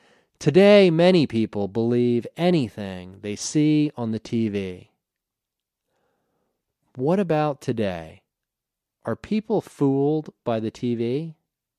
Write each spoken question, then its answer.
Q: What about today? Are people fooled by the TV?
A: Yes.